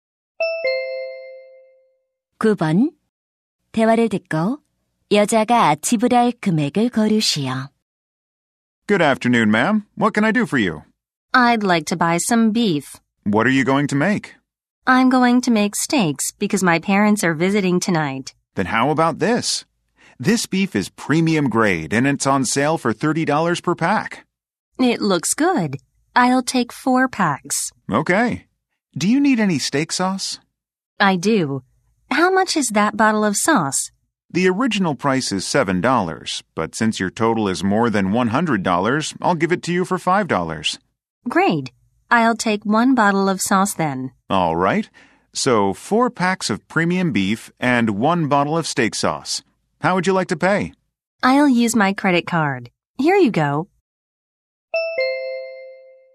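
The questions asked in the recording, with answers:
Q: 대화를 듣고 여자가 지불할 금액을 고르시오.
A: $125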